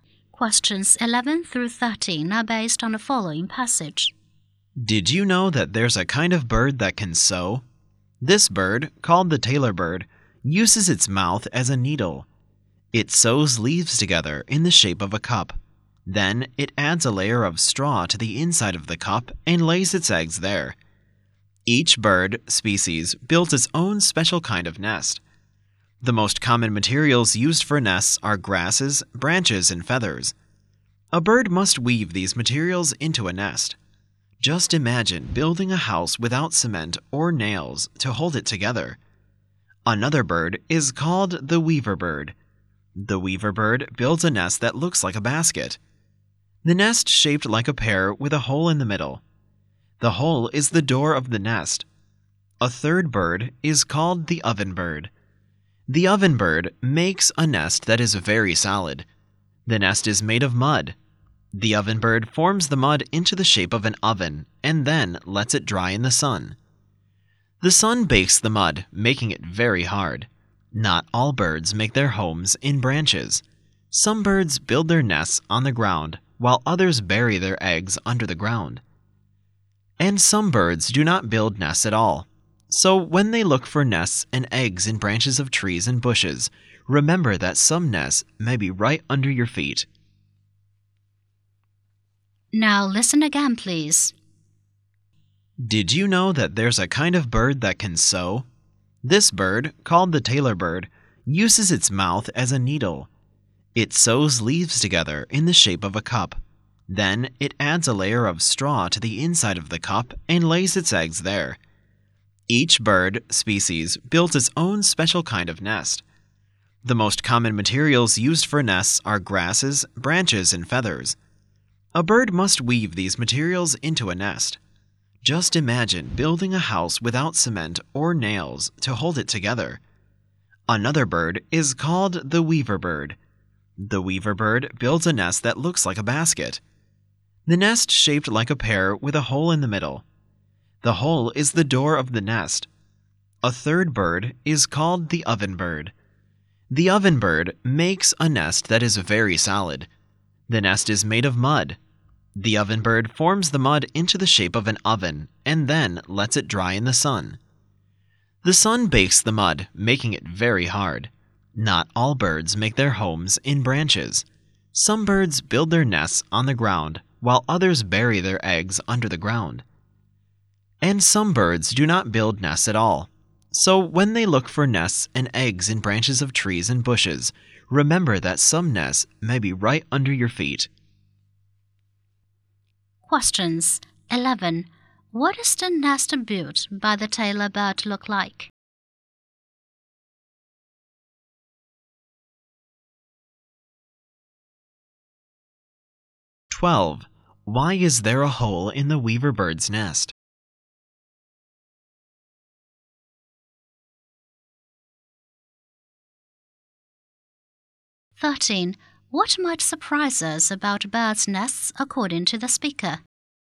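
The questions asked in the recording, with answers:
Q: What is the nest built by the tailor bird look like?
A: A cup

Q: Why is there a hole in the weaver bird's nest?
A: It is the door of the nest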